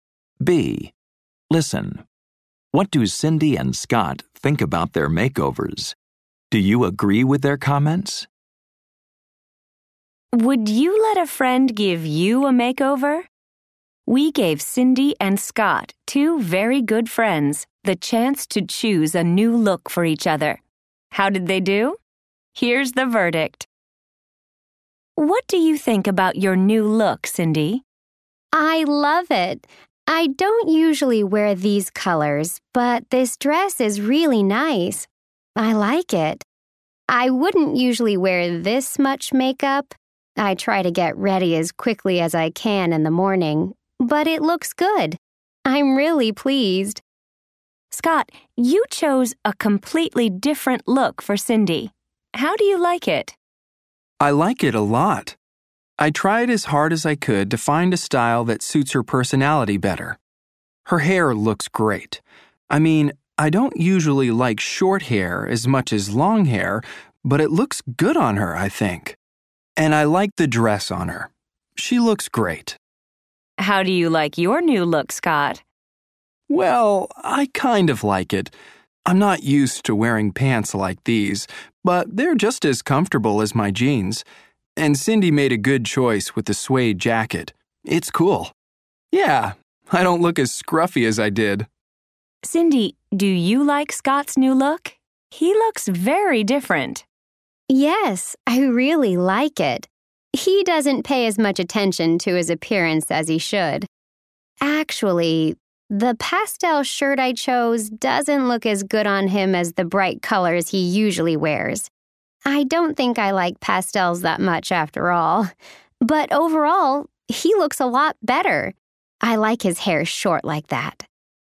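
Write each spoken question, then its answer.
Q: What do Cindy and Scott think about their makeovers?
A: Overall, both like them. Cindy loves her new dress and look, though she usually wouldn't wear that much makeup. Scott likes his comfortable pants and suede jacket.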